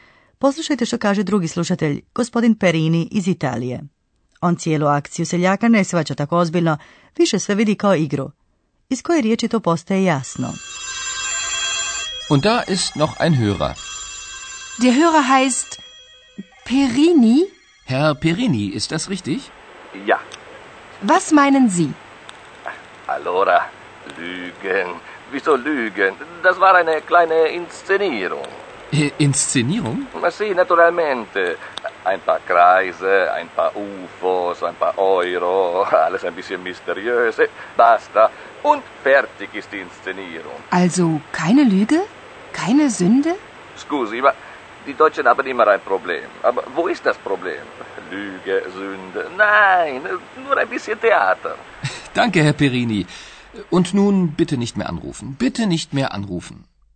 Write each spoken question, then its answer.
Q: Iz koje riječi to postaje jasno.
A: Sigurno ste uspjeli razaznati riječ inscenacija, inscenirung.